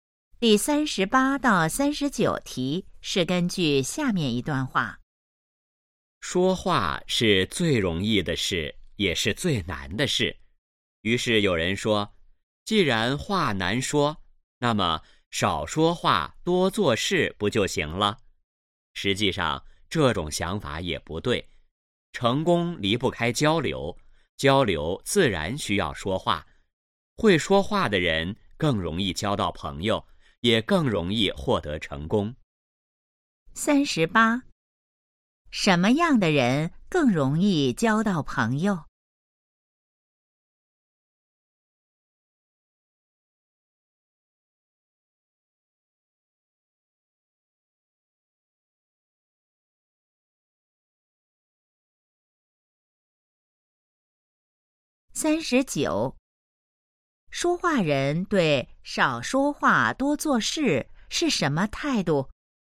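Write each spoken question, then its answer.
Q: 什么样的人更容易交到朋友?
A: 会说话的人

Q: 说话人对少说话多做事是什么态度?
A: 不同意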